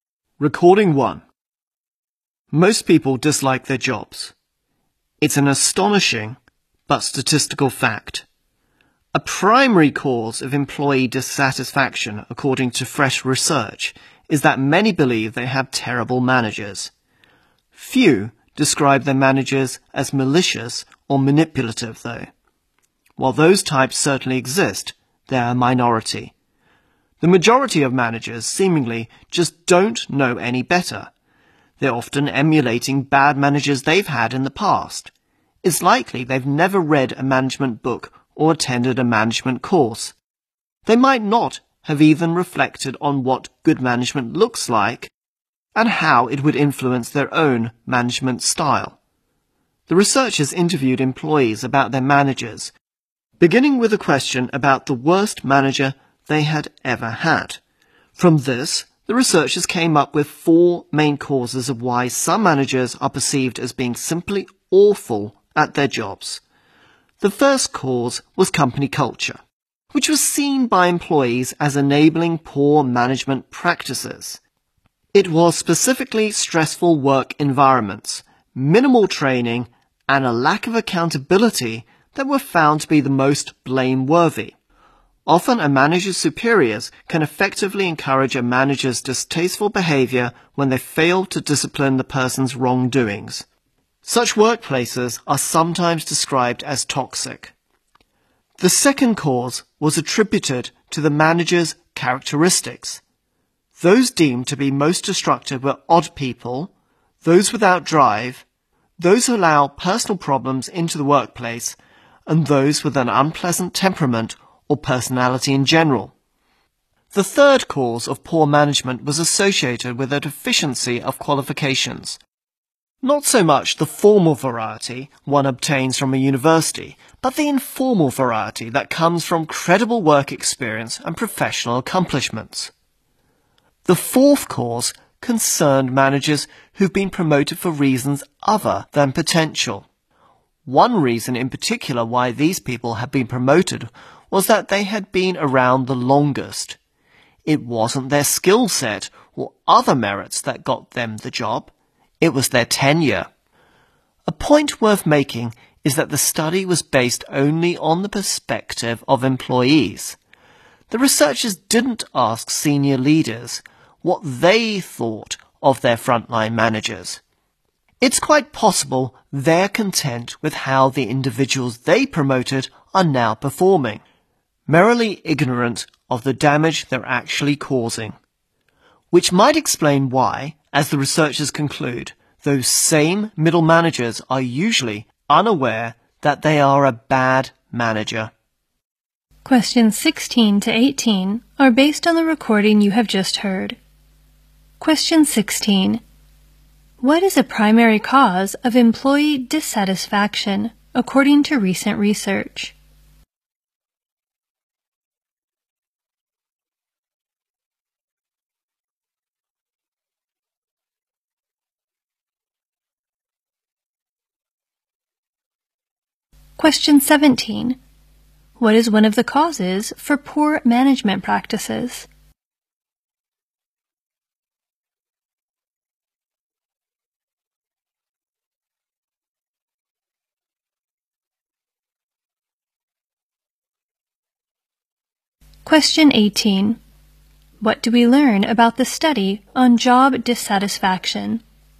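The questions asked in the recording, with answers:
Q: What is a primary cause of employee dissatisfaction, according to recent research?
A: They believe they have terrible managers

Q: What do we learn about the study on job dissatisfaction?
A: It was based only on the employees' point of view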